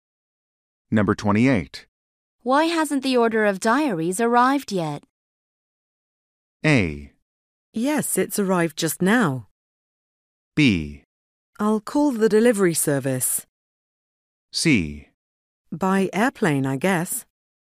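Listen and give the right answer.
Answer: B: I'll call the delivery service.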